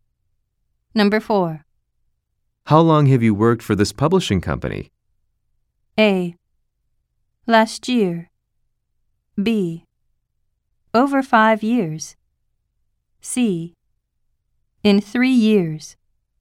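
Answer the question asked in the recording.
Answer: B: Over 5 years.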